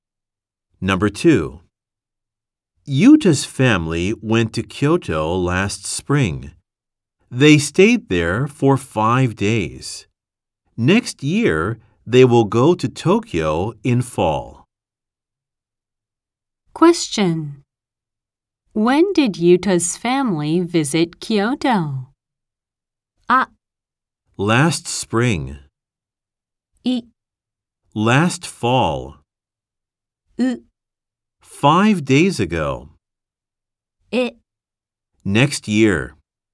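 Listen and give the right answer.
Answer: あ: Last spring.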